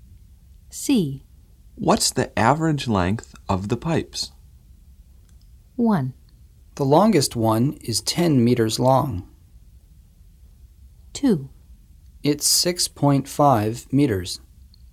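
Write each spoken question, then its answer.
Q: What's the average length of the pipes?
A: 2: It's 6.5 meters.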